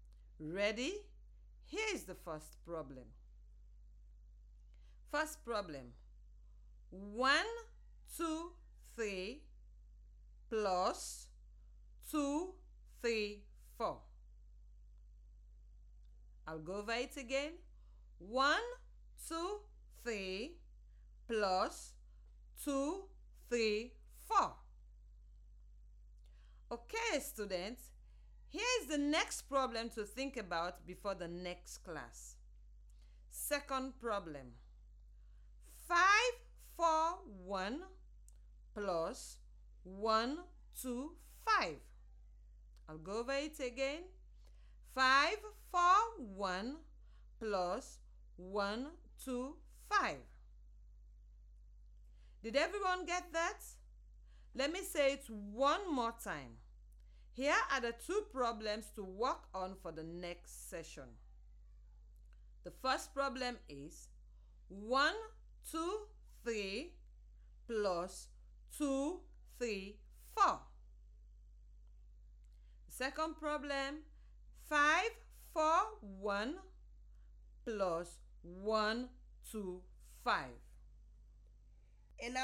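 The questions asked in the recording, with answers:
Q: 1, 2, 3 plus 2, 3, 4.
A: 357

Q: 5, 4, 1 plus 1, 2, 5.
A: 666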